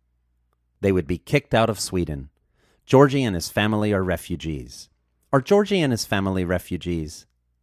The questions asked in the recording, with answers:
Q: Are Georgie and his family refugees?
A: Yes, Georgie and his family are refugees.